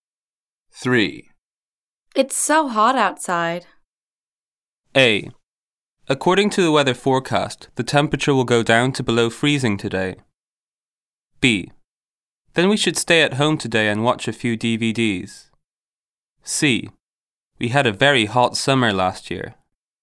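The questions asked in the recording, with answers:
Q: It's so hot outside.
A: B: Then we should stay at home today and watch a few DVDs.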